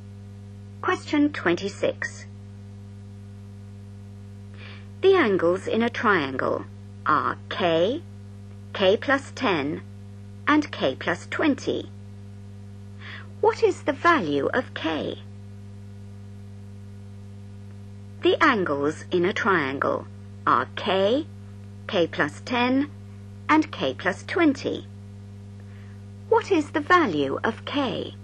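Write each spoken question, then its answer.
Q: What is the value of K?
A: 50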